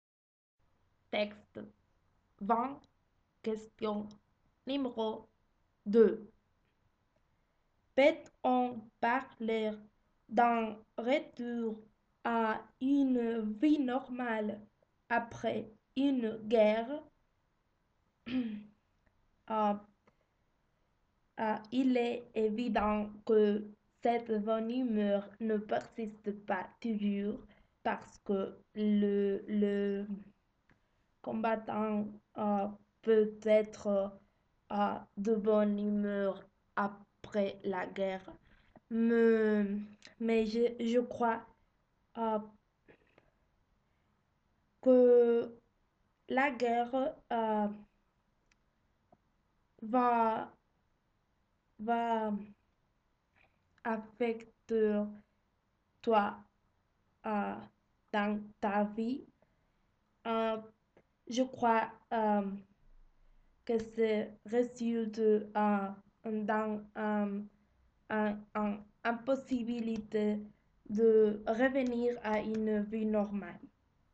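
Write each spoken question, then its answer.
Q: Peut-on parler d'un retour à une vie normale après une guerre?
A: Non, la guerre affecte la vie et il est impossible de revenir à une vie normale.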